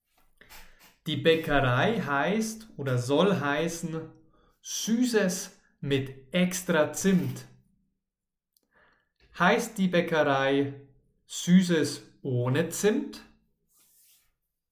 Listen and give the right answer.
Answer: Nein, natürlich nicht. Die Bäckerei heißt oder soll heißen Süßes mit extra Zimt.